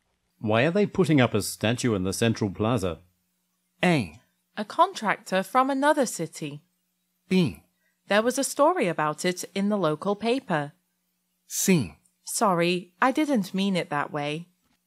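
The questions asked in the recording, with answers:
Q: Why are they putting up a statue in the central plaza?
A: B: There was a story about it in the local paper.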